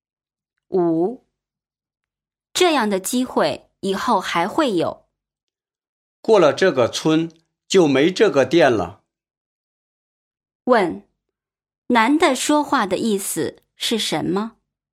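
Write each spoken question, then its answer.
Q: 男的说话的意思是什么?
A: 这样的机会很难得,错过就没有了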